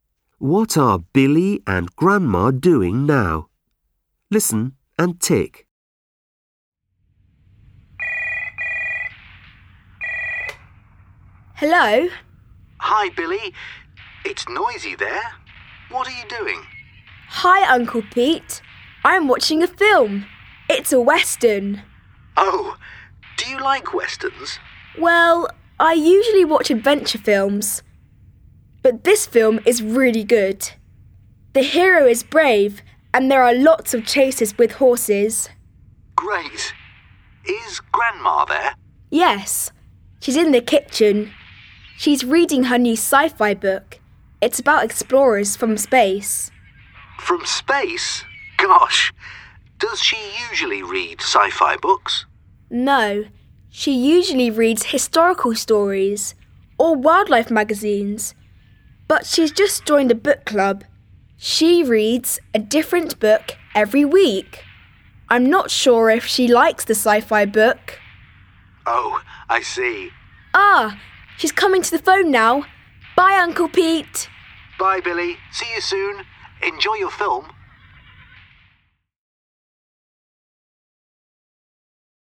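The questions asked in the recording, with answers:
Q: What are Billy and Grandma doing now?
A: Billy is watching a western film and Grandma is reading a sci-fi book.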